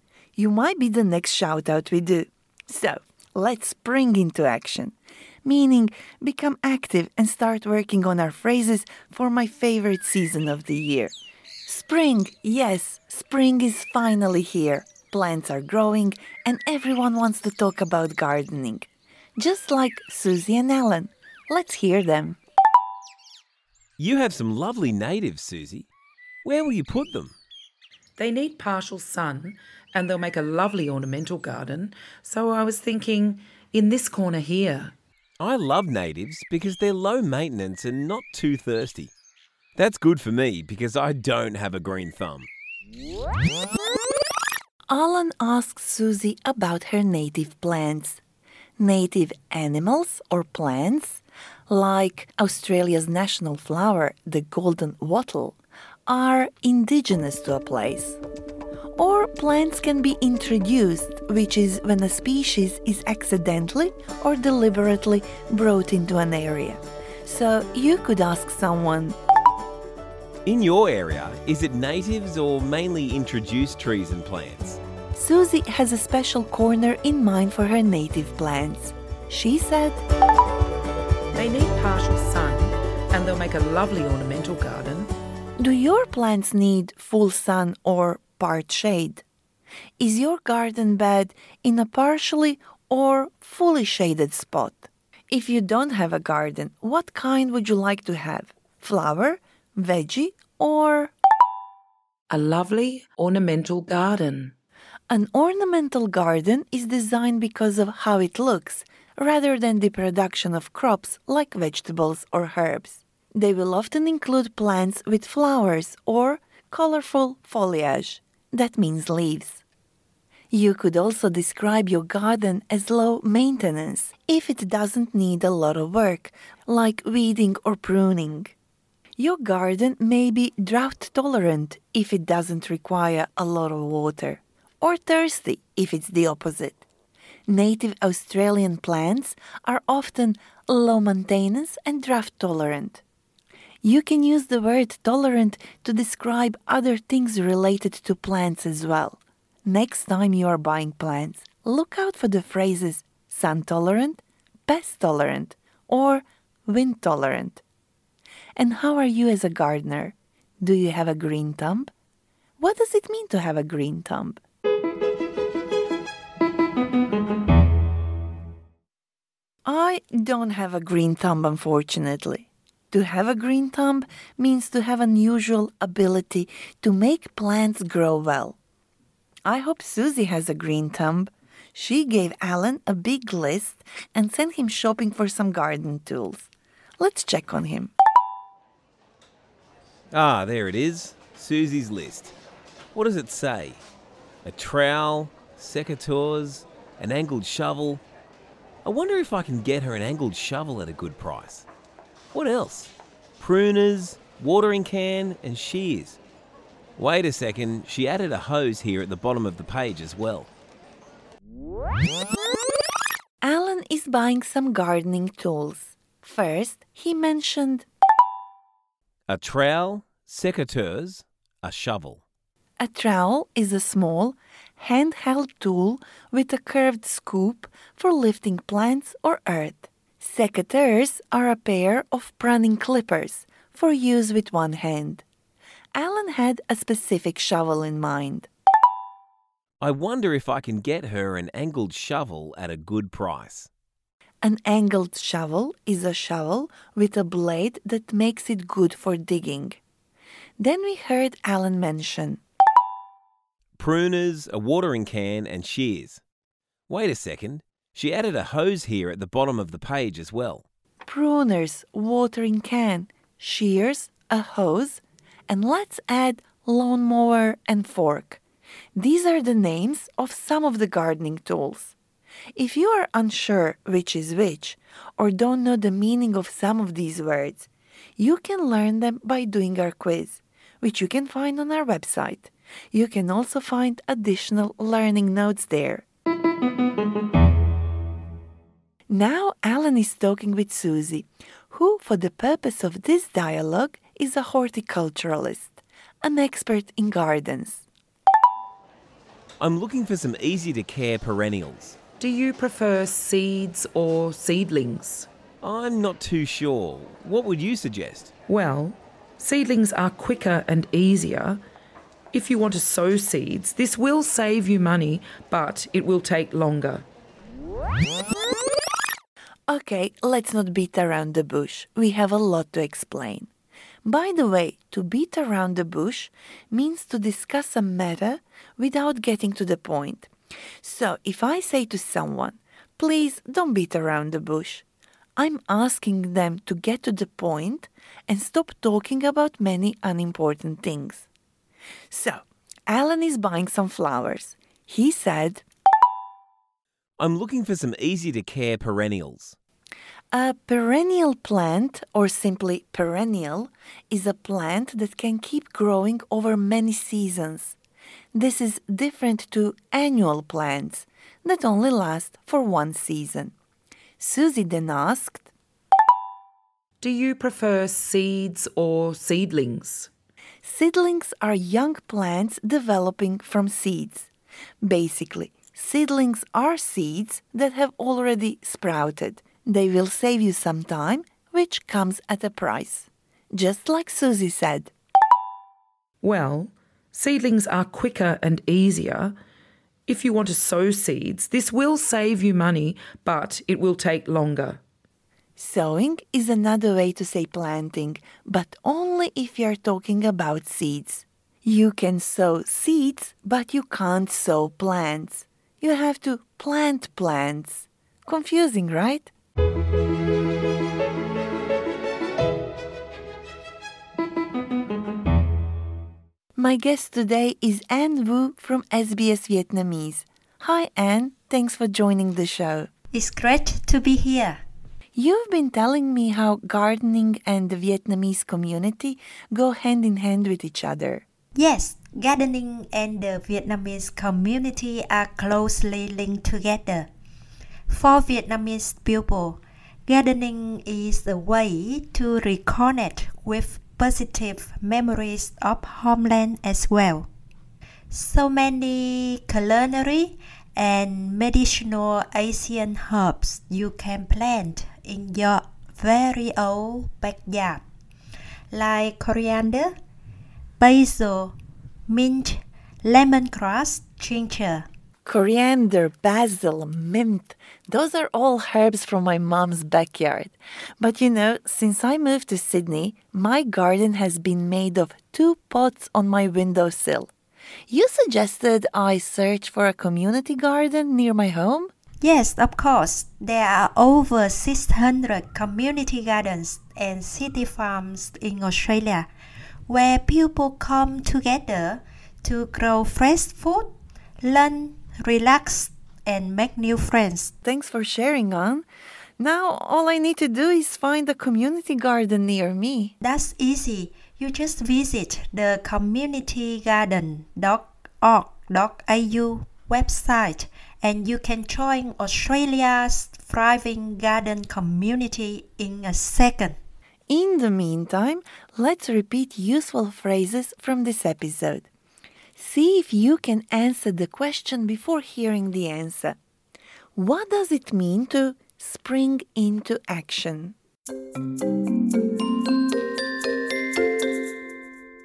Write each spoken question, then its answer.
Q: What does it mean to spring into action?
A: To spring into action means to become suddenly very active and energetic.